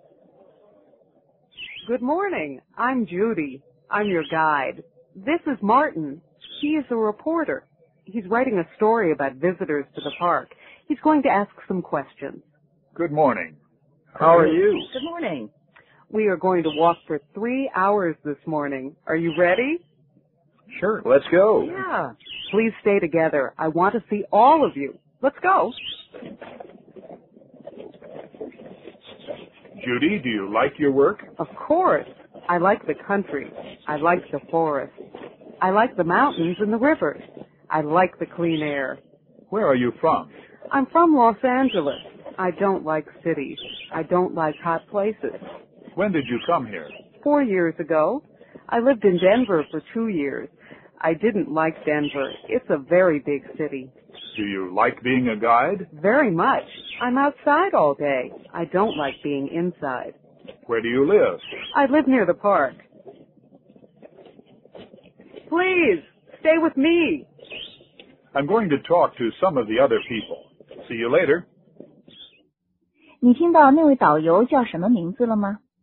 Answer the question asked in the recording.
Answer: 他叫 Judy。